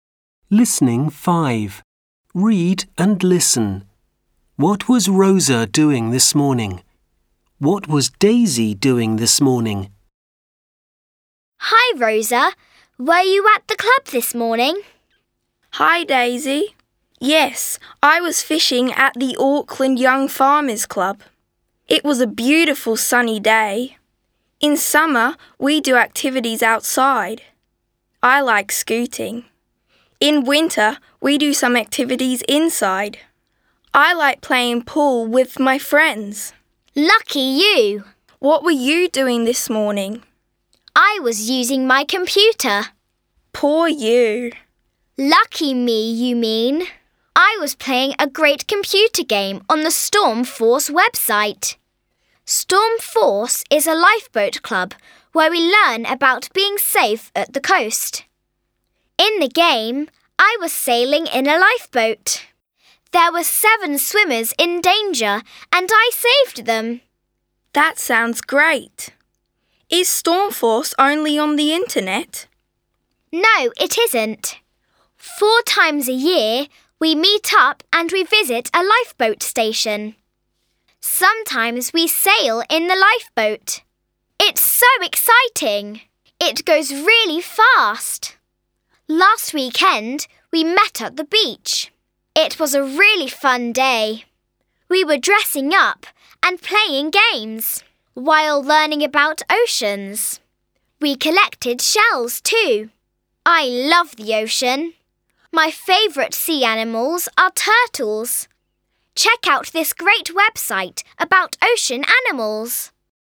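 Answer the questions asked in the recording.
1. She was fishing at the Auckland Young Farmers Club.
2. She was playing a computer game on the Storm Force website.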